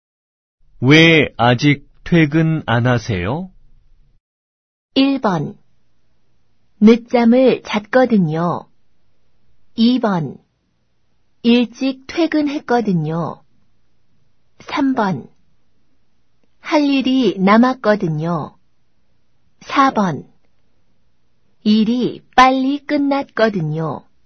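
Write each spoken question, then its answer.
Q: 왜 아직 퇴근 안 하세요?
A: 3: 할 일이 남았거든요.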